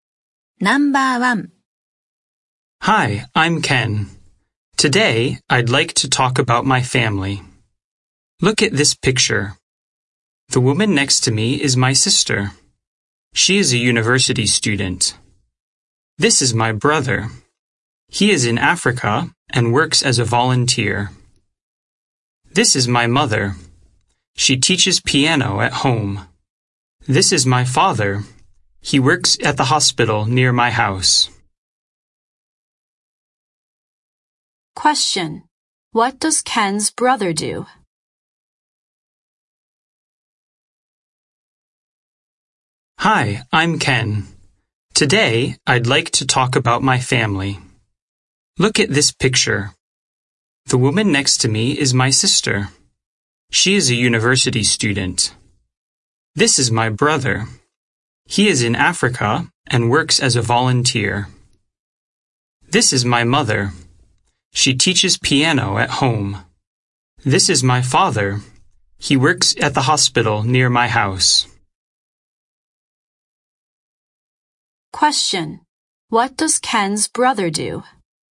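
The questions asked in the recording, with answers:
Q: What does Ken's brother do?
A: He works as a volunteer in Africa.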